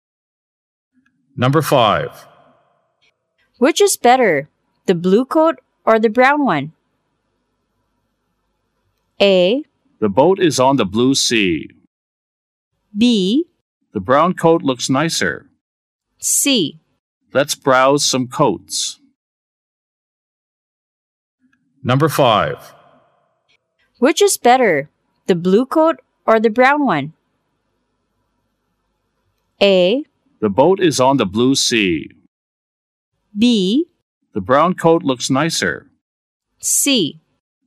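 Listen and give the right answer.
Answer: B: The brown coat looks nicer.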